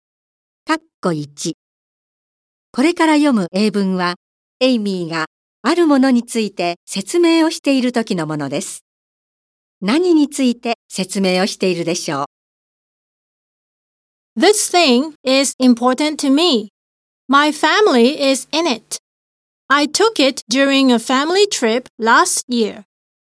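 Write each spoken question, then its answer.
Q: 何について説明をしているでしょう。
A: 写真(家族旅行で撮った家族の写真)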